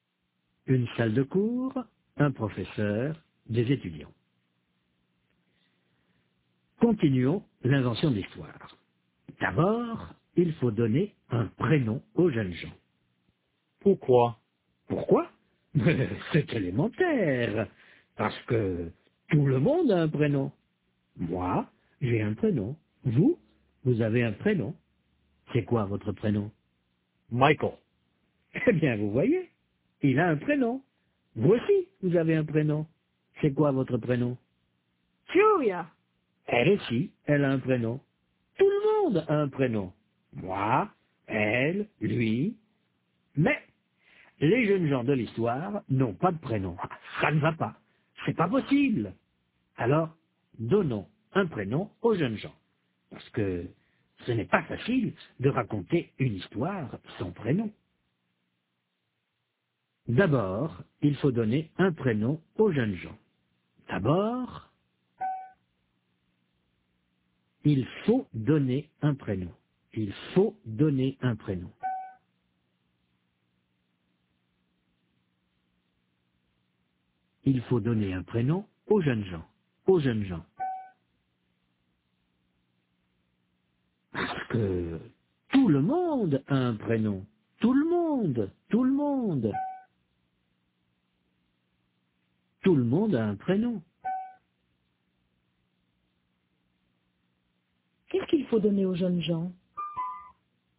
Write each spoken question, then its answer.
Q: Qu'est-ce qu'il faut donner aux jeunes gens ?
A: Un prénom.